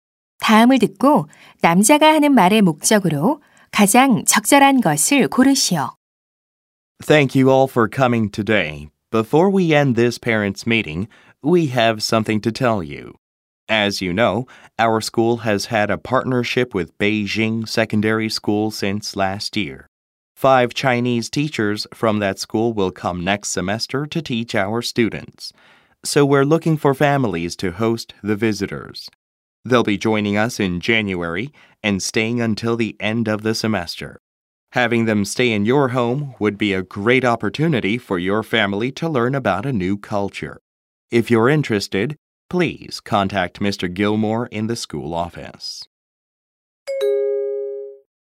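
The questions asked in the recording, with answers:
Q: 다음을 듣고 남자가 하는 말의 목적으로 가장 적절한 것을 고르시오.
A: 방문하는 중국 교사들을 맞이할 홈스테이 가정을 모집하려고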